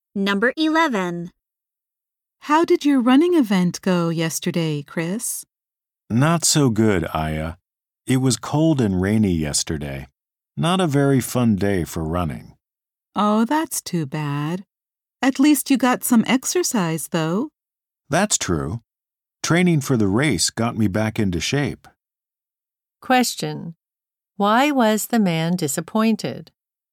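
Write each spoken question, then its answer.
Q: Why was the man disappointed?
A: The weather was cold and rainy for his running event.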